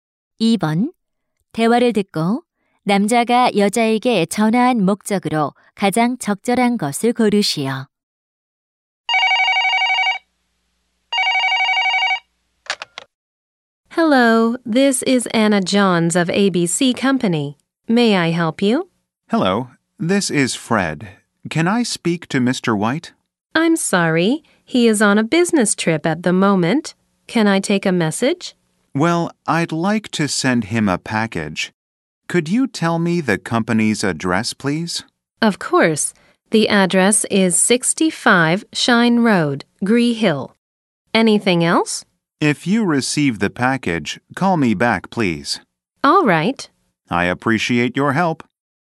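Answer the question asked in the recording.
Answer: 소포를 보내기 위해 회사 주소를 물어보려고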